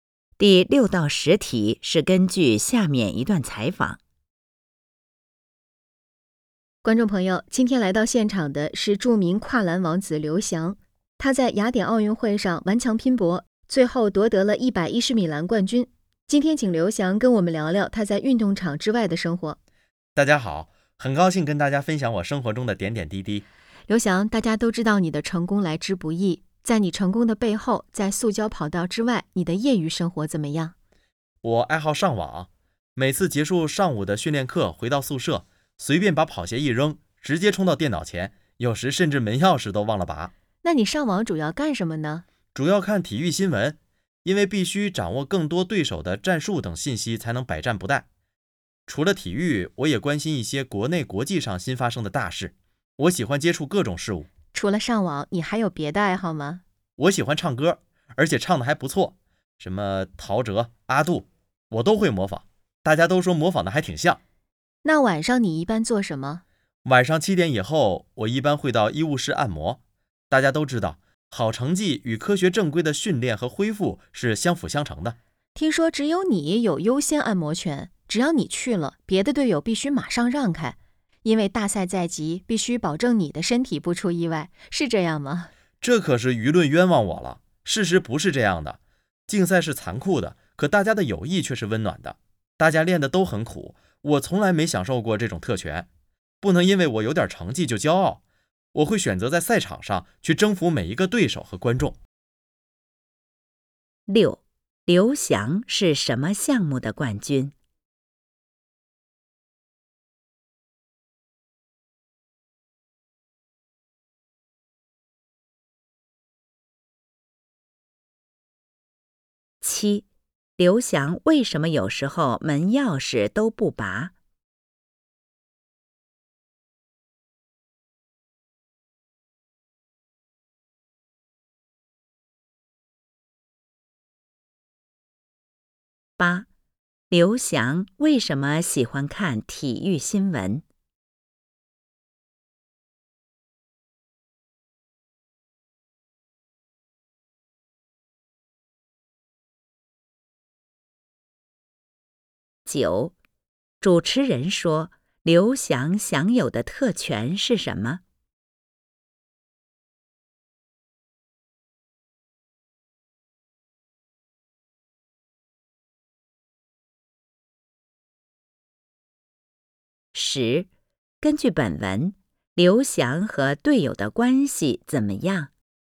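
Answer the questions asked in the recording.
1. 110米栏
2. 急着上网
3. 为了掌握对手的战术等信息
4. 优先按摩权
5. 友好、温暖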